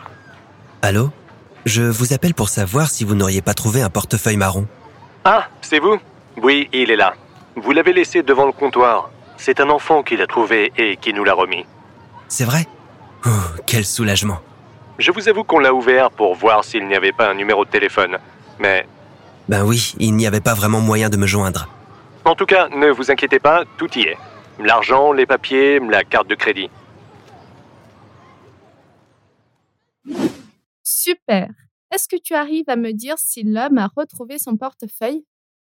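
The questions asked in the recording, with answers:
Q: Est-ce que tu arrives à me dire si l'homme a retrouvé son portefeuille?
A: Oui, il l'a laissé devant le comptoir et tout y est.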